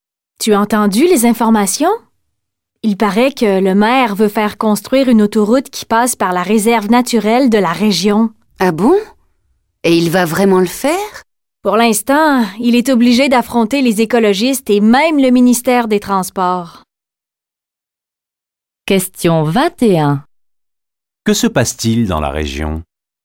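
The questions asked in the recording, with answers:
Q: Que se passe-t-il dans la région?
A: Le maire veut faire construire une autoroute à travers la réserve naturelle, ce qui l'oppose aux écologistes et au ministère des Transports.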